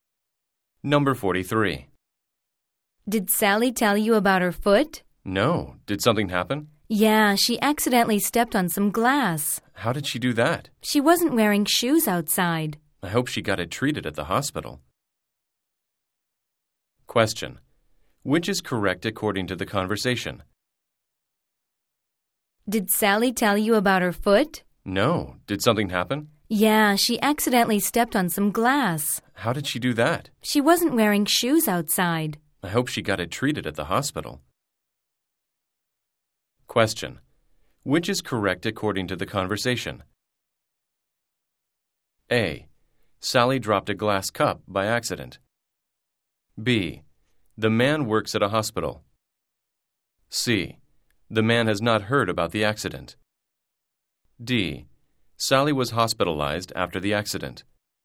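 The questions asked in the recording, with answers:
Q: Which is correct according to the conversation?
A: C: The man has not heard about the accident.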